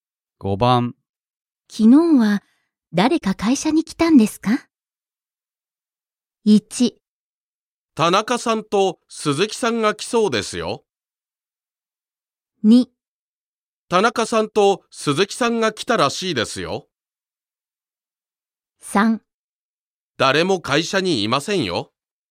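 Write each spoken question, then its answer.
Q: 昨日は誰か会社に来たんですか?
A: 2: 田中さんと鈴木さんが来たらしいですよ。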